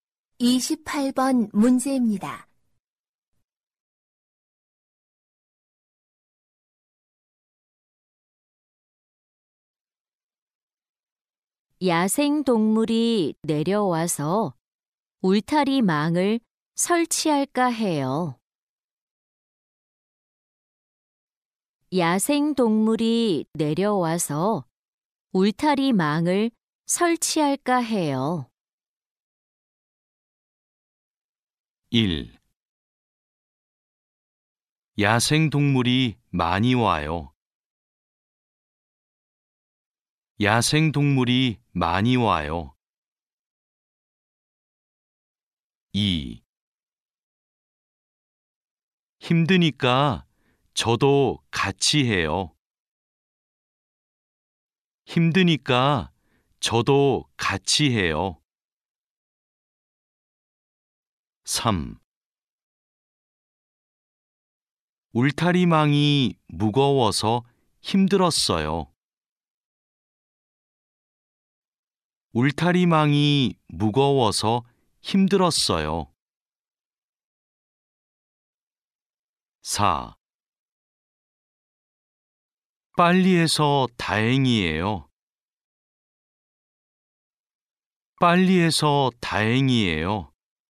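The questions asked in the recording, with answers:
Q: 야생동물이 내려와서 울타리 망을 설치할까 해요.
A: 2: 힘드니까 저도 같이 해요.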